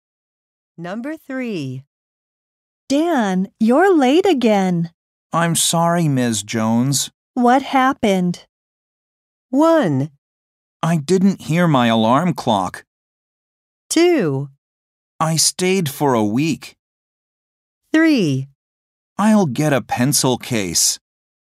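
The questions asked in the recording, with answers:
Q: What happened?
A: 1: I didn't hear my alarm clock.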